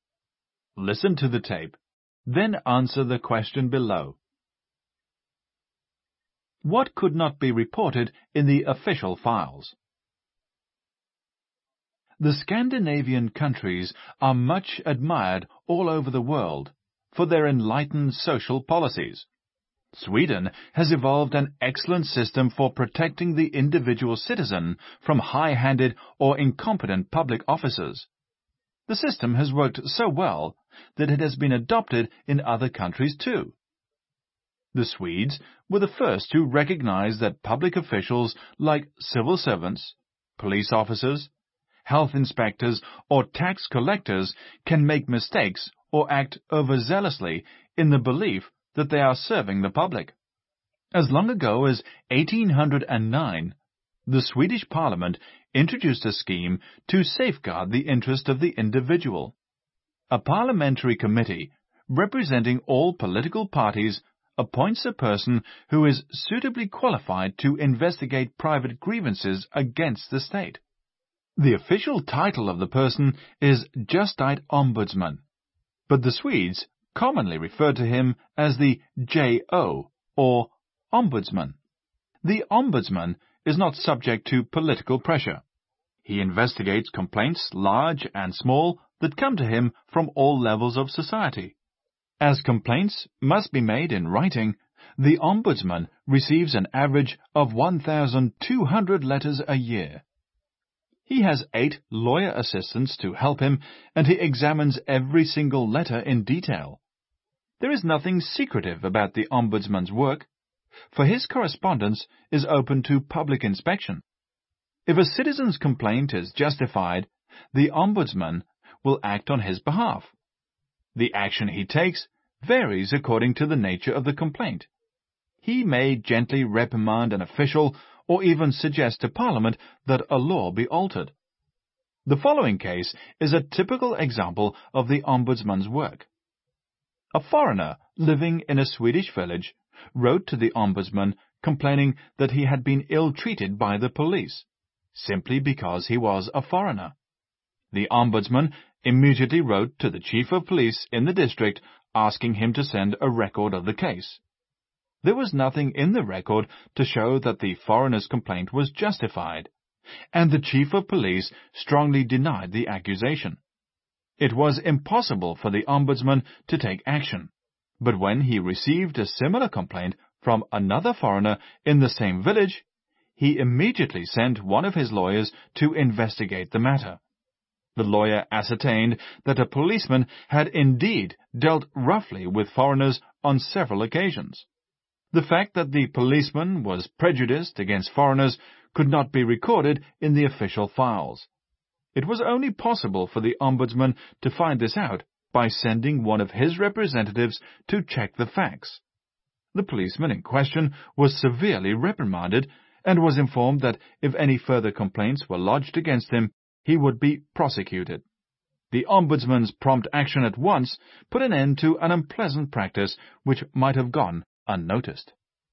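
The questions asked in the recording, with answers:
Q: What could not be reported in the official files?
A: The fact that the policeman was prejudiced against foreigners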